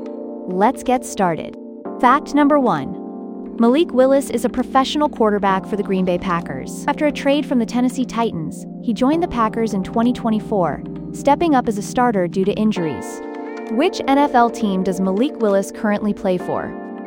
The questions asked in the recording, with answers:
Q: Which NFL team does Malik Willis currently play for?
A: Correct answer, Green Bay Packers.